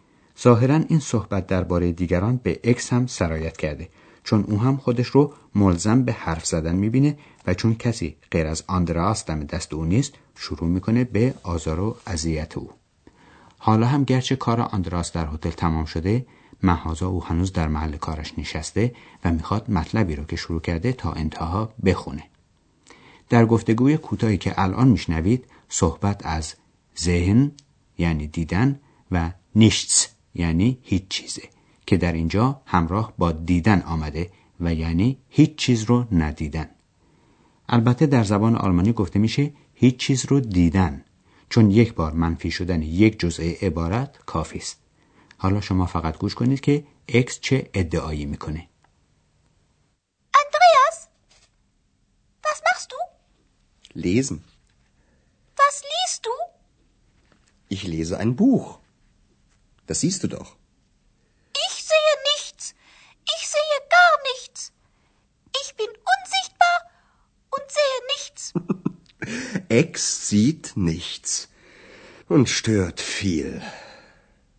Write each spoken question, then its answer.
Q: حالا شما فقط گوش کنید که اکس چه ادعایی میکنه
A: اکس ادعا میکنه که هیچ چیز رو نمیبینه